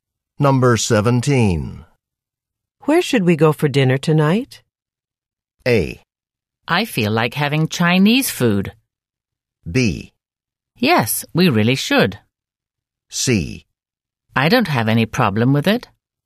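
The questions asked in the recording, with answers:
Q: Where should we go for dinner tonight?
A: A: I feel like having Chinese food.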